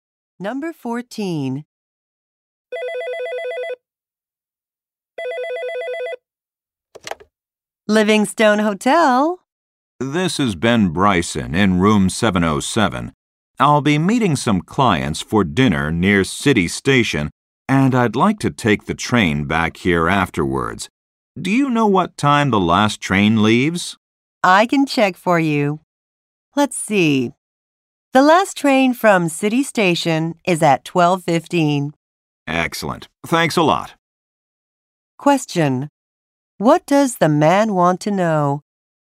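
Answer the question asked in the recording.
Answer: What time the last train leaves City Station.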